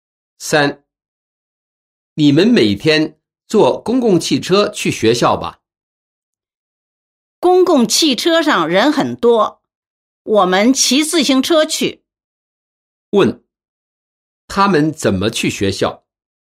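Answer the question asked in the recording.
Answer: 骑自行车去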